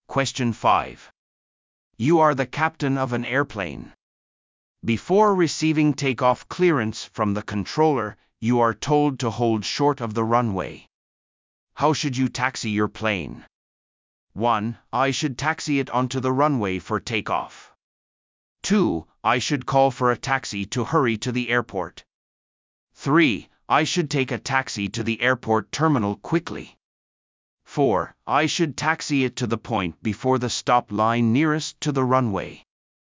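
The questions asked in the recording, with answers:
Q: How should you taxi your plane?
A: 4: I should taxi it to the point before the stop line nearest to the runway.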